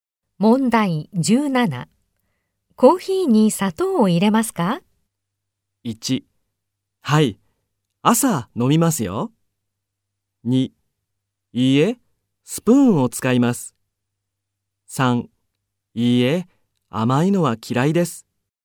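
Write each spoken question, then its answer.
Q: コーヒーに砂糖を入れますか?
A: 2: いいえ、甘いのは嫌いです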